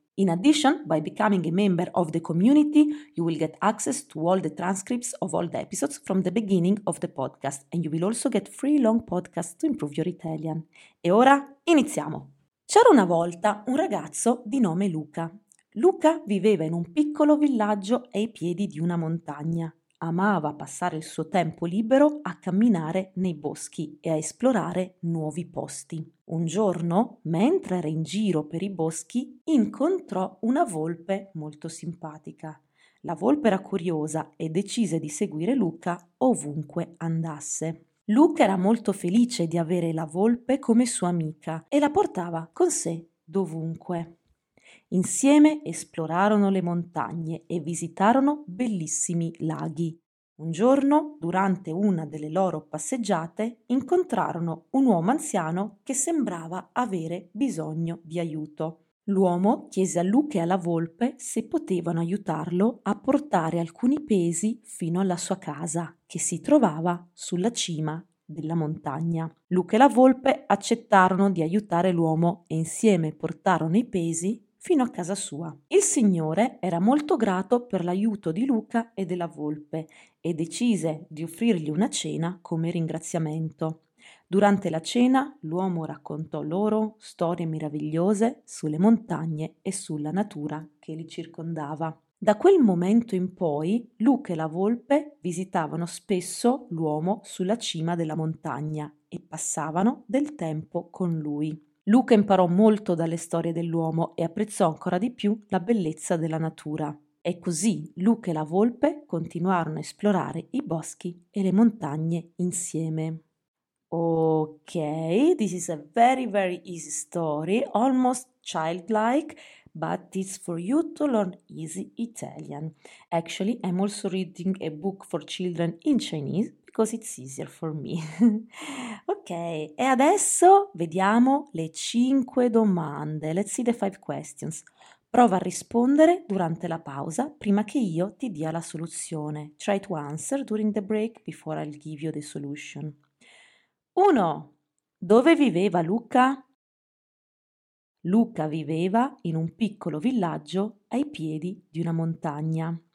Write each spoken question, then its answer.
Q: Dove viveva Luca?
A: Luca viveva in un piccolo villaggio ai piedi di una montagna.